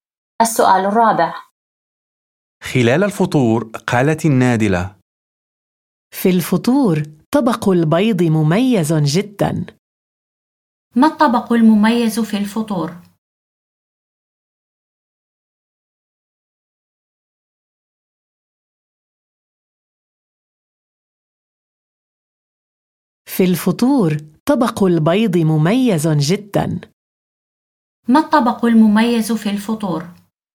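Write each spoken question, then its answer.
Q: ما الطبق المميز في الفطور؟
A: طبق البيض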